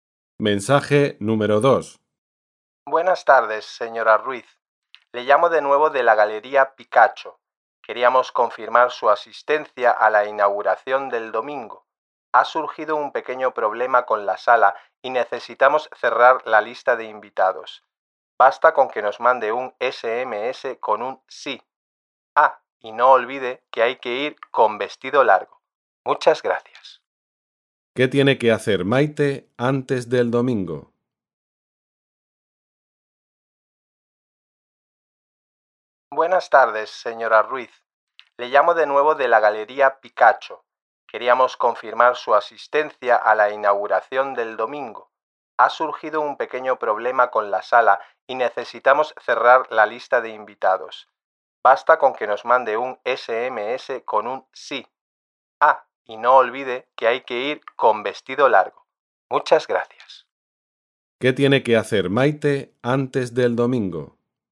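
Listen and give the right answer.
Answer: Confirmar su asistencia enviando un SMS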